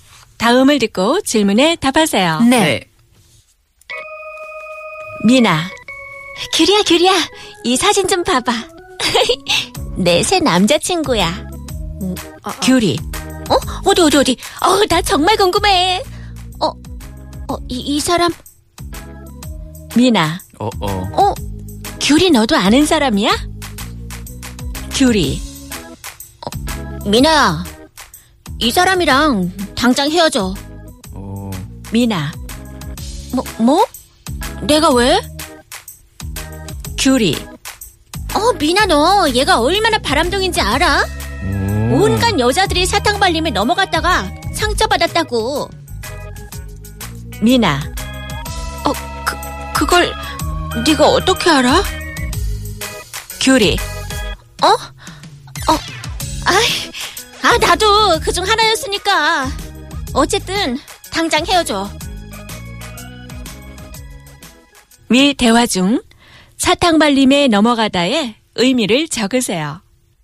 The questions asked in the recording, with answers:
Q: 위 대화 중 사탕 발림에 넘어가다의 의미를 적으세요.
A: Well, the answer is to be deceived by sugar-coated words.